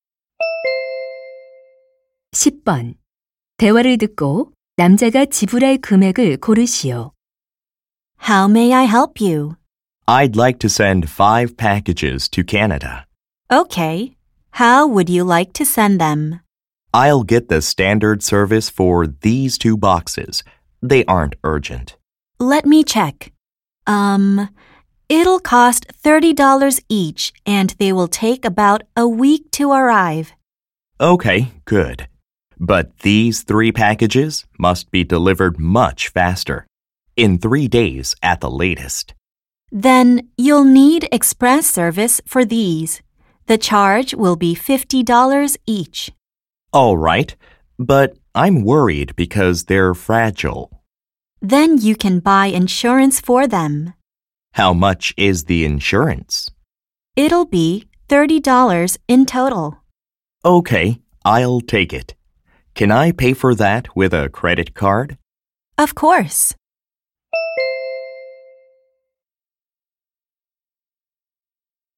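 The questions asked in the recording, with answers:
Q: 대화를 듣고 남자가 지불할 금액을 고르시오.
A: $240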